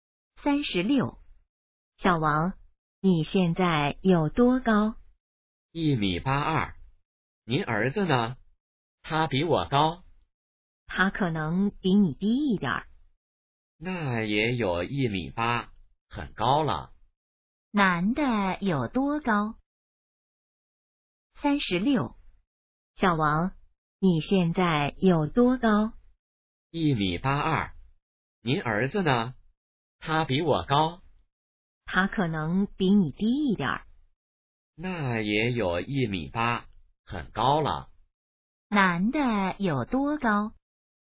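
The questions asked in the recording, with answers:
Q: 男的有多高?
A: 1.82米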